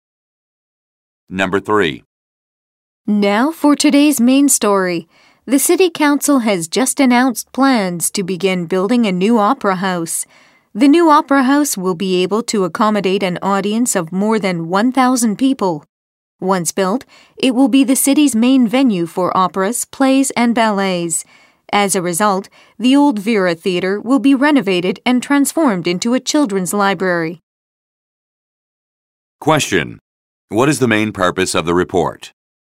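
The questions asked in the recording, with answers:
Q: What is the main purpose of the report?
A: To announce the city council's plans to build a new opera house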